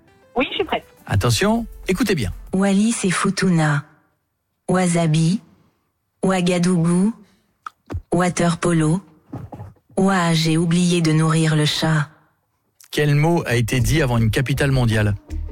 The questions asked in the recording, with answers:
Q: Quel mot a été dit avant une capitale mondiale?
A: Bravo, puisque c'était avant Ouagadougou, c'était wasabi.